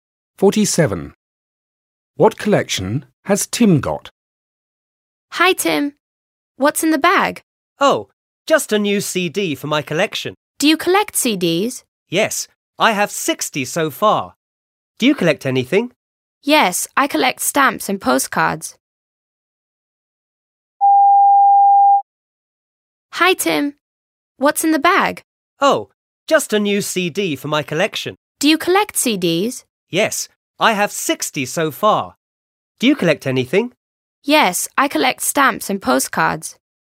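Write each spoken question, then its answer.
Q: What collection has Tim got?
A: CDs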